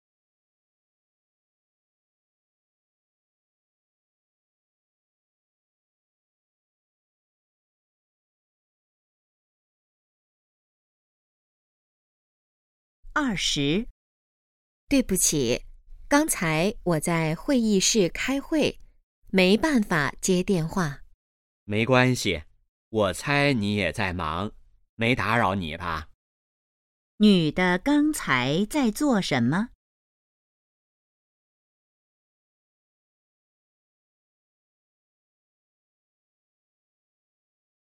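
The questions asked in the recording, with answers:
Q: 女的刚才在做什么?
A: 开会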